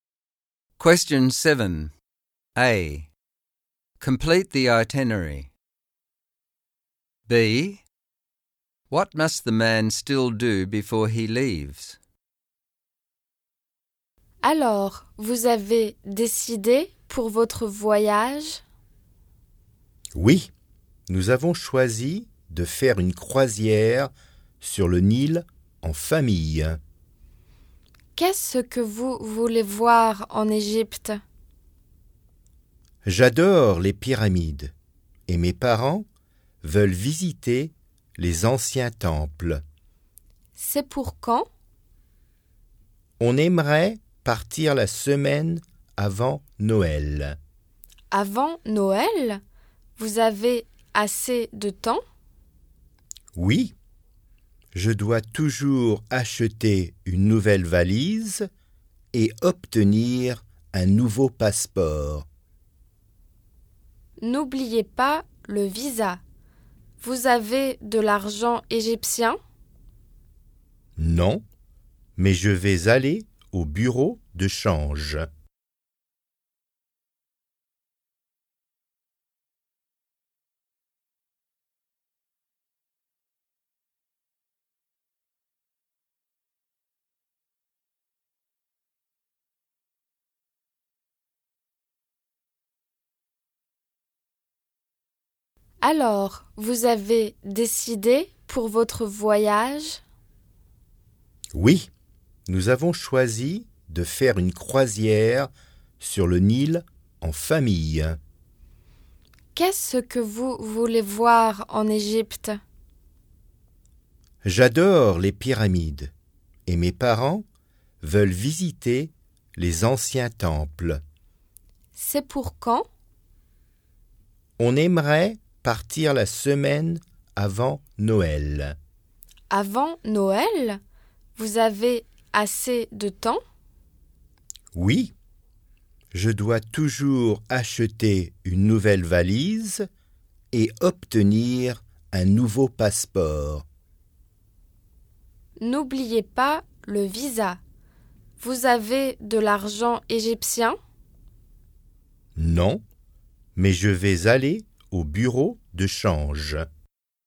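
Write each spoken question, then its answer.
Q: B. What must the man still do before he leaves?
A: Buy a new suitcase, get a new passport (and visa), and change money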